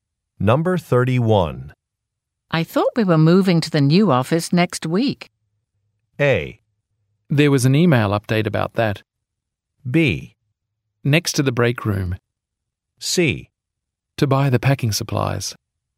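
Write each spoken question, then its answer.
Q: I thought we were moving to the new office next week.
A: A: There was an email update about that.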